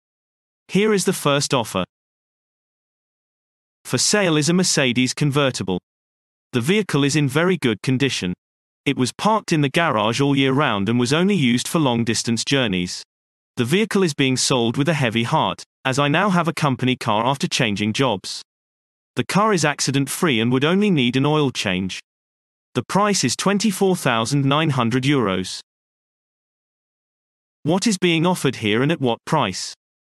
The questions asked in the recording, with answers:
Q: What is being offered here and at what price?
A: Answer. A car is being sold at a price of €24,900.